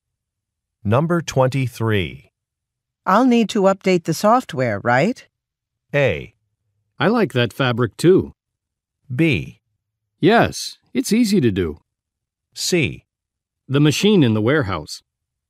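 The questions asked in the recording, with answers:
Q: I'll need to update the software, right?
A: B: Yes, it's easy to do.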